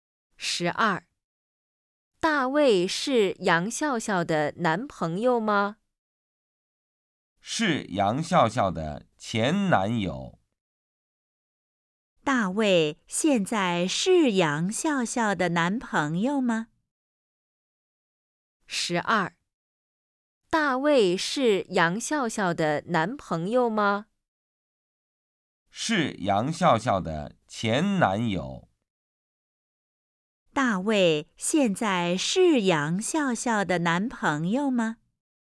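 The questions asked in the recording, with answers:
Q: 大卫现在是杨笑笑的男朋友吗?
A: 不是,是前男友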